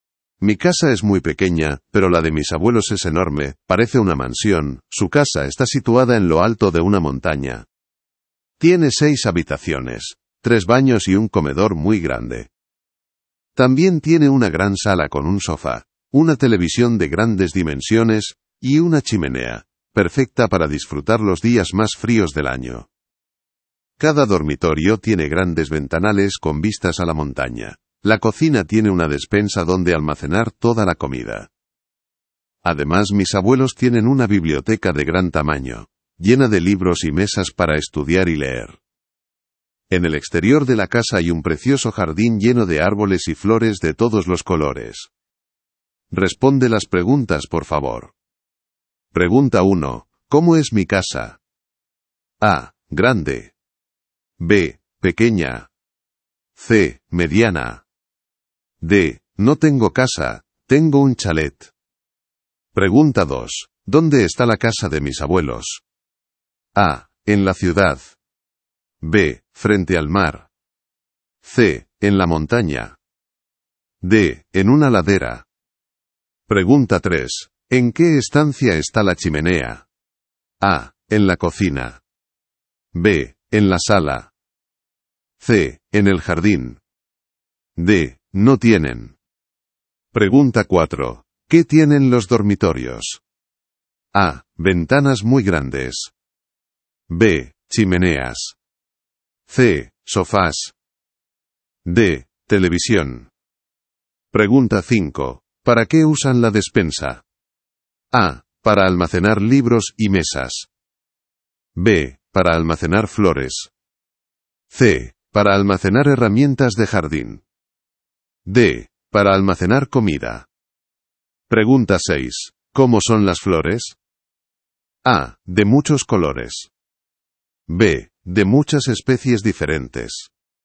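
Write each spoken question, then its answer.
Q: ¿Cómo es mi casa?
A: B: Pequeña.

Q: ¿Dónde está la casa de mis abuelos?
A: C: En la montaña.

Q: ¿En qué estancia está la chimenea?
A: B: En la sala.

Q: ¿Qué tienen los dormitorios?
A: A: Ventanas muy grandes.

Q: ¿Para qué usan la despensa?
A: D: Para almacenar comida.

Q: ¿Cómo son las flores?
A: A: De muchos colores.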